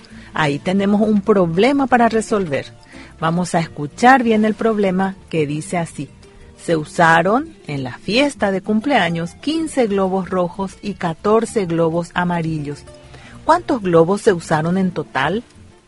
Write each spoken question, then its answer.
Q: ¿Cuántos globos se usaron en total?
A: Se usó en total 29 globos.